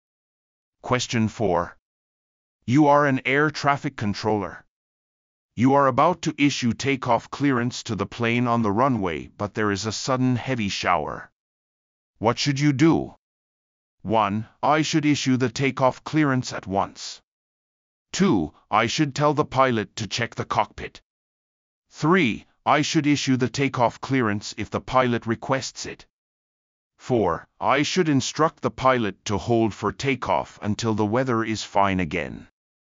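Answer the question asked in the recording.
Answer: 4: I should instruct the pilot to hold for takeoff until the weather is fine again.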